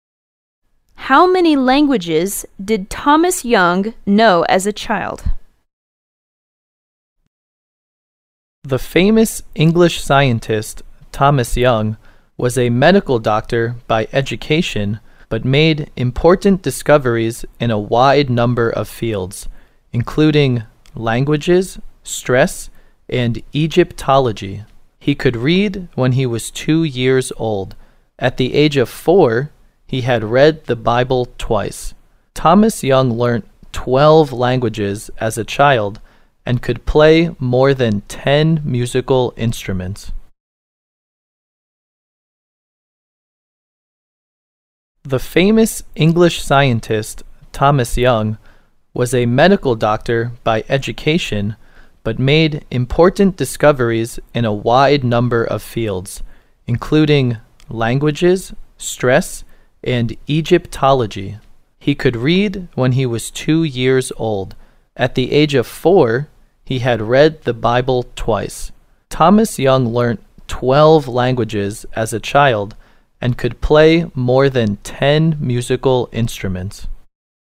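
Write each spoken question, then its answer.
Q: How many languages did Thomas Young know as a child?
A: 12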